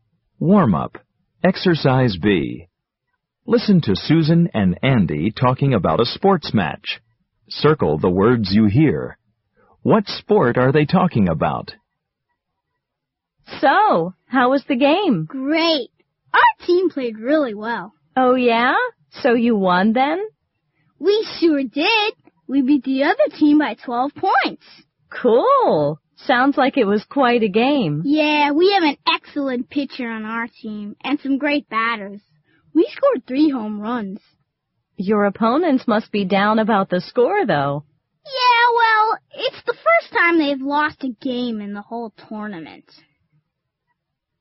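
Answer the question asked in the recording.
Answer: Baseball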